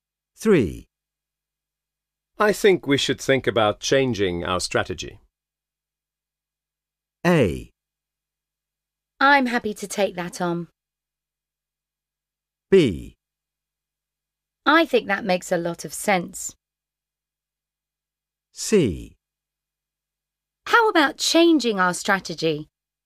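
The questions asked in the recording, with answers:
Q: I think we should think about changing our strategy.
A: B: I think that makes a lot of sense.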